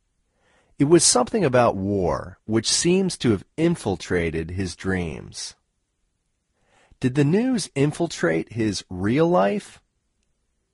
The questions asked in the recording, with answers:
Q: Did the news infiltrate his real life?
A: No, the news didn't infiltrate his real life.